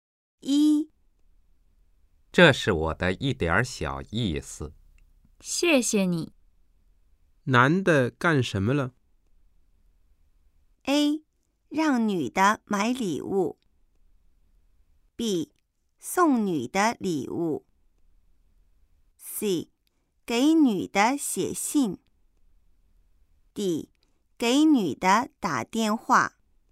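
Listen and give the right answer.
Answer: B: 送女的礼物。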